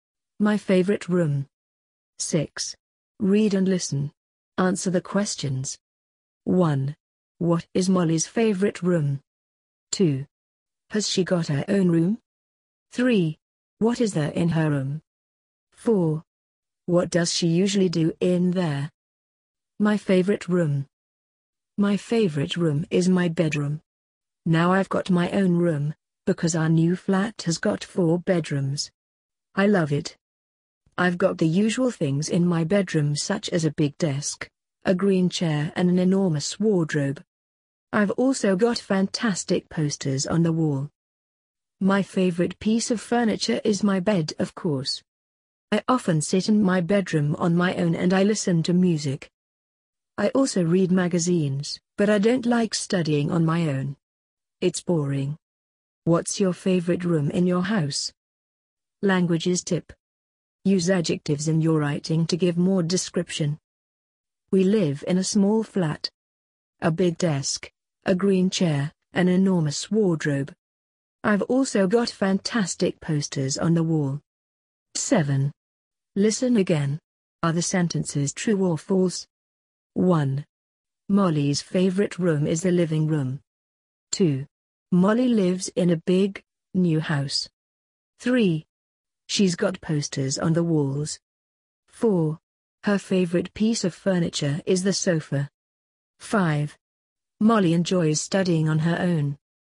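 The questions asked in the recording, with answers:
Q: What is Molly's favorite room?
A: Her bedroom

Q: Has she got her own room?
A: Yes, she has

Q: What is there in her room?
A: A big desk, a green chair, an enormous wardrobe, posters and a bed

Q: What does she usually do in there?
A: She listens to music and reads magazines

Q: Molly's favorite room is the living room.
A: False

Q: Molly lives in a big, new house.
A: False

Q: She's got posters on the walls.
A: True

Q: Her favorite piece of furniture is the sofa.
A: False

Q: Molly enjoys studying on her own.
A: False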